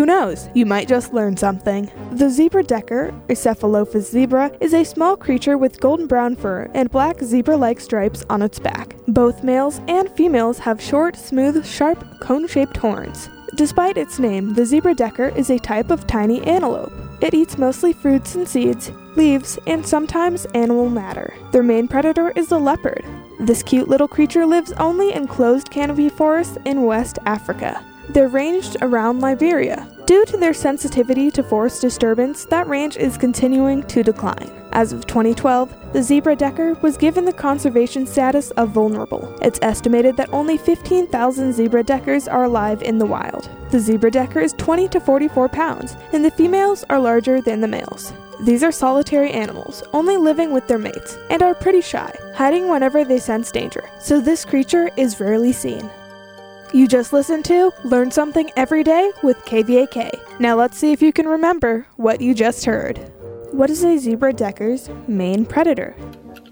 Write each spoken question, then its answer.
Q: What is a zebra-decker's main predator?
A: The zebra-decker's main predator is the leopard.